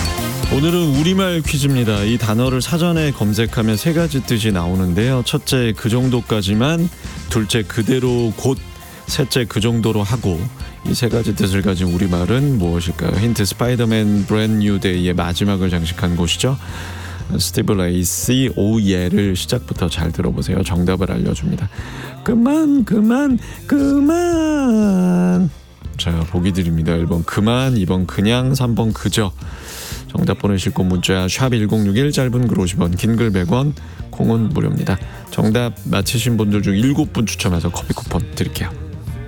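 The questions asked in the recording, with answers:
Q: 이 세 가지 뜻을 가진 우리말은 무엇일까요?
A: 1: 그만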